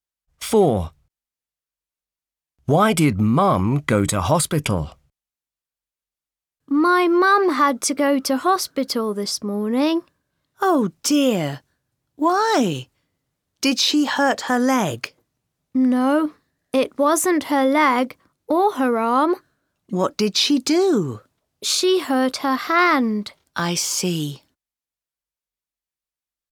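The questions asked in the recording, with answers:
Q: Why did Mum go to hospital?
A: She hurt her hand.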